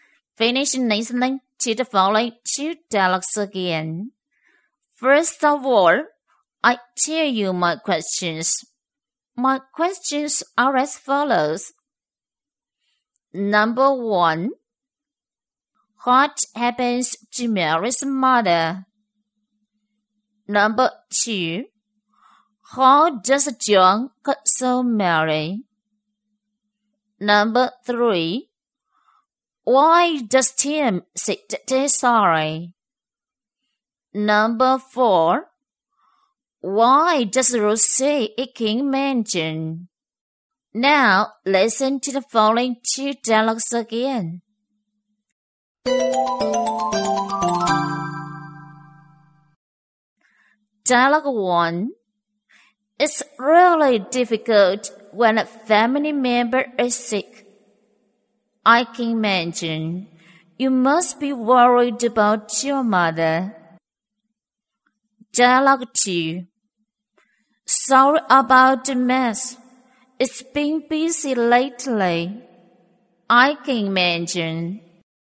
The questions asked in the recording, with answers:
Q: what happens to Mary's mother?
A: Mary's mother is sick.

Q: How does John console Mary?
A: He says he can imagine how difficult it is when a family member is sick.

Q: why does Tim say that he's sorry?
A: Because his room is in a mess.